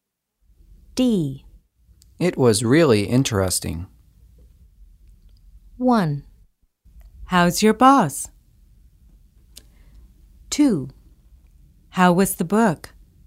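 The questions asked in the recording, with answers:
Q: It was really interesting.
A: 2: How was the book?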